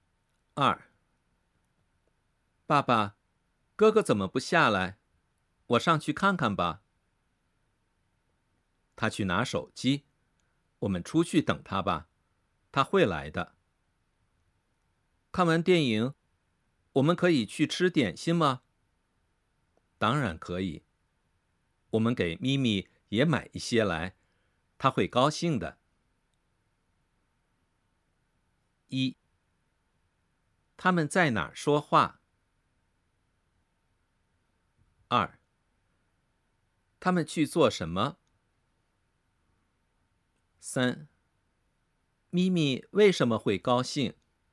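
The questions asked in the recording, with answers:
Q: 他们去做什么?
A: 看电影

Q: 咪咪为什么会高兴?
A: 因为他们给咪咪买点心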